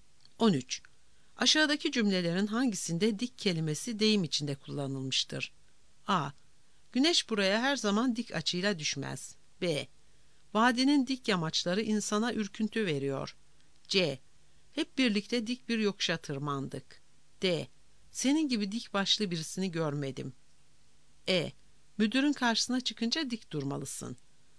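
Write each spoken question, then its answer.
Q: Aşağıdaki cümlelerin hangisinde dik kelimesi deyim içinde kullanılmıştır?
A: D: Senin gibi dik başlı birisini görmedim.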